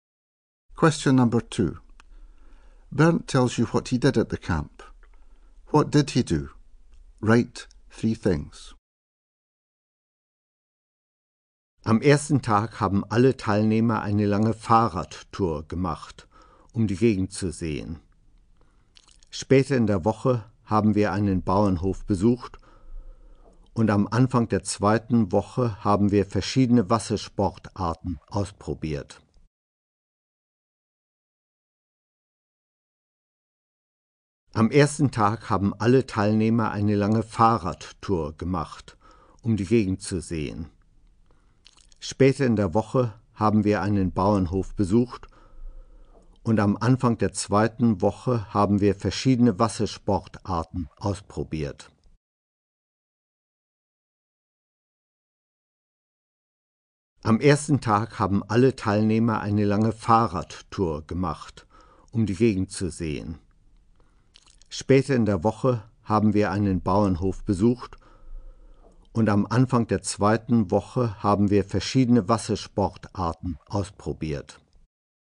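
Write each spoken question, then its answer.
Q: What did he do? Write three things.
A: Went on a long bike ride; visited a farm; tried different water sports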